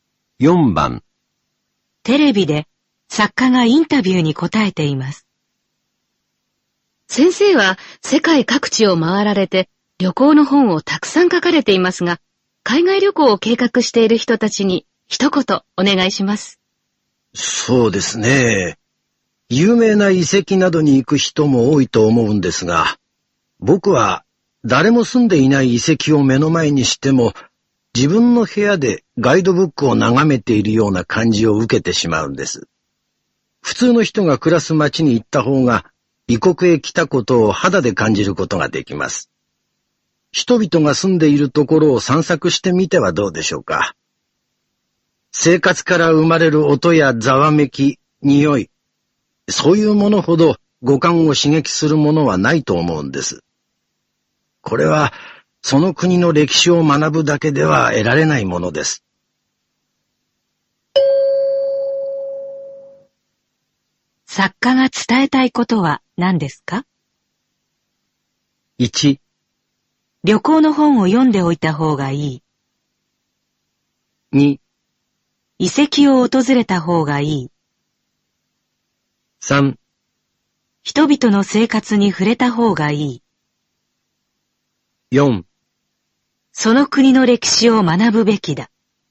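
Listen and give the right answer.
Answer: 3: 人々の生活に触れた方がいい。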